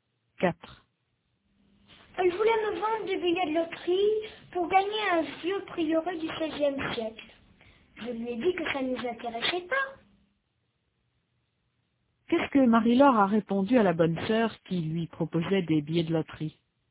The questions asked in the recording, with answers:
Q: Qu'est-ce que Marie-Laure a répondu à la bonne sœur qui lui proposait des billets de loterie?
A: Que ça ne les intéressait pas.